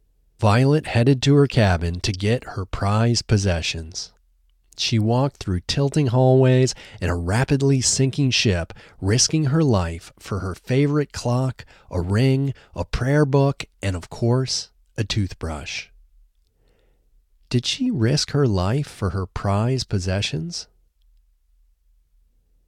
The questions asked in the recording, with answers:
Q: Did she risk her life for her prized possessions?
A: Yes, she risked her life for her prized possessions.